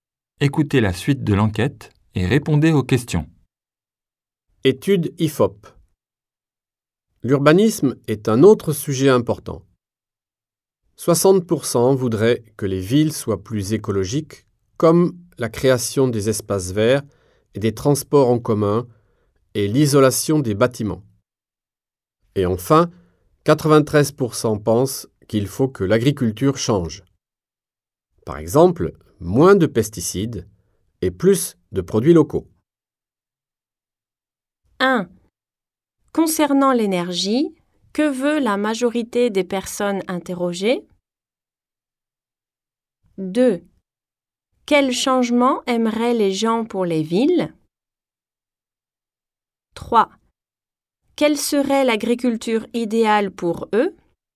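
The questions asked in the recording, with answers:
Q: Quels changements aimeraient les gens pour les villes?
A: Des villes plus écologiques : espaces verts, transports en commun, isolation des bâtiments

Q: Quelle serait l'agriculture idéale pour eux?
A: Moins de pesticides et plus de produits locaux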